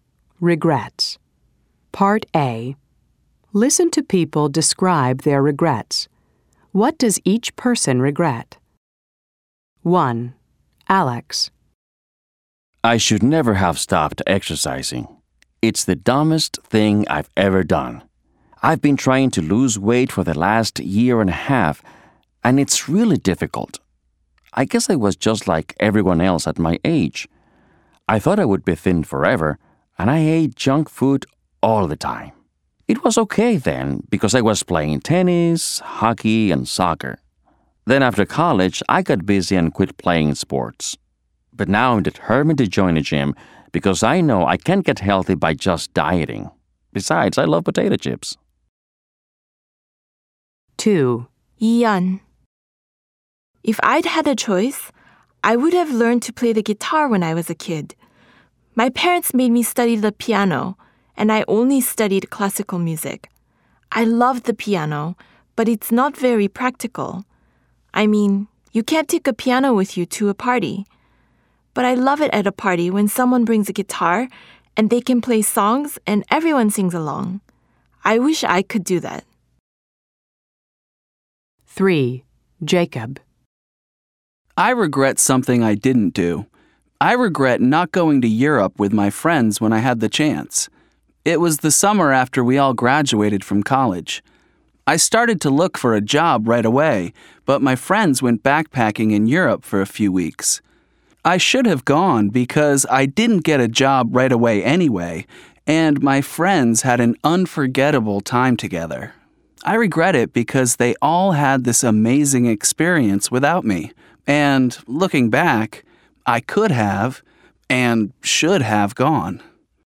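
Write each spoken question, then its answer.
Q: What does each person regret?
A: Alex regrets stopping exercising.

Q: What does each person regret?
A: Ian regrets not learning to play the guitar as a kid.

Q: What does each person regret?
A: Jacob regrets not going to Europe with his friends after college.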